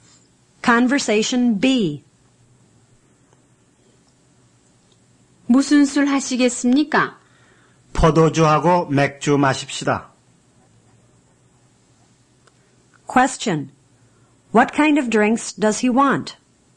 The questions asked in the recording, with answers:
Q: What kind of drinks does he want?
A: He wants wine and beer.